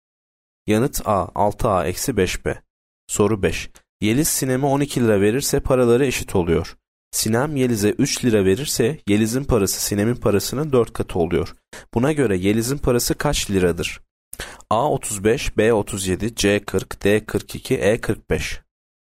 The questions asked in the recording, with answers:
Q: Buna göre Yeliz'in parası kaç liradır?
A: Yanıt B 37.